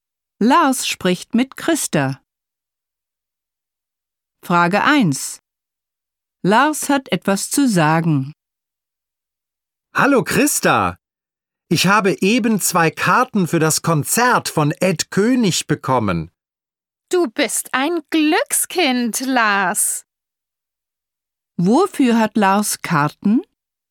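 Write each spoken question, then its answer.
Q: Wofür hat Lars Karten?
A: Für das Konzert von Ed König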